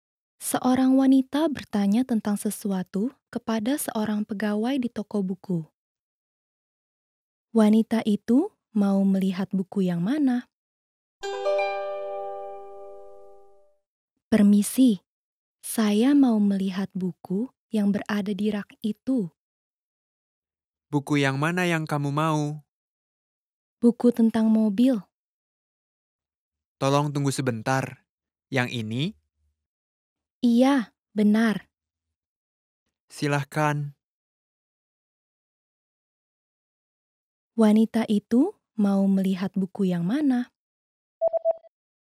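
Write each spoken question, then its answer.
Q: Wanita itu Mau melihat buku yang mana?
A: Buku tentang mobil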